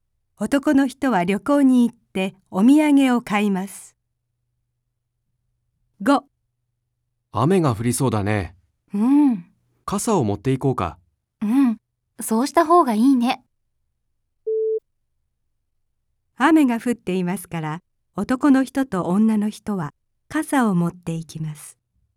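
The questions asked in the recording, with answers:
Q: 雨が降っていますから、男の人と女の人は傘を持っていきます。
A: ×(まだ降っていない)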